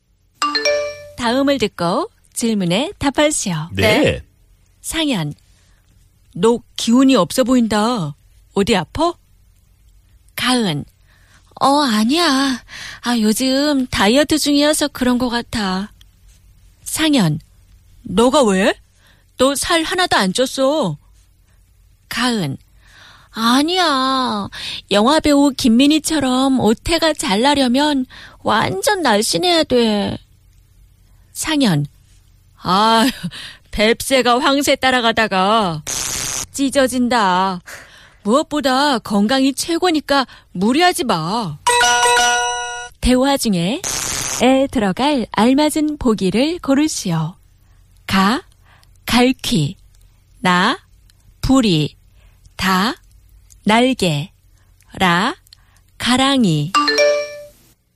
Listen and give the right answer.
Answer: La karangi. In between the legs, the crotchal area.